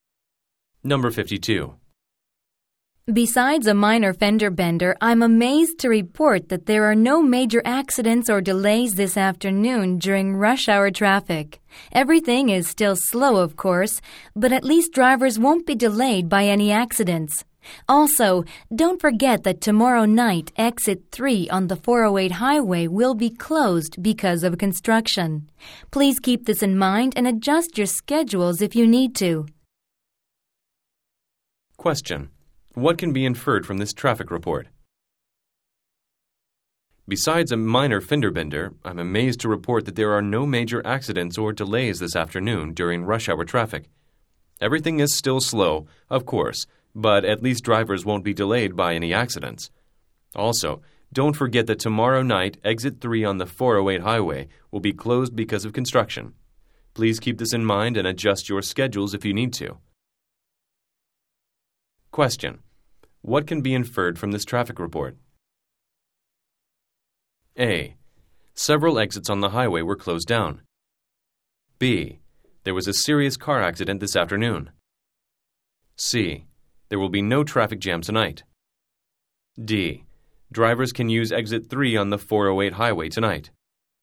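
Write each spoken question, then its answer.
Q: What can be inferred from this traffic report?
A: D: Drivers can use exit 3 on the 408 highway tonight.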